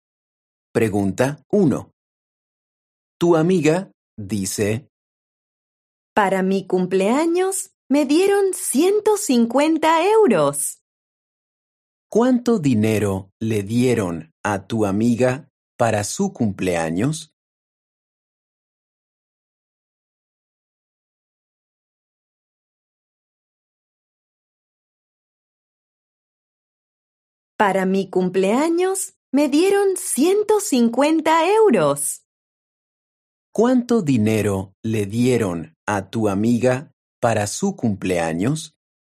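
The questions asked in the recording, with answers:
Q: ¿Cuánto dinero le dieron a tu amiga para su cumpleaños?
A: 150 euros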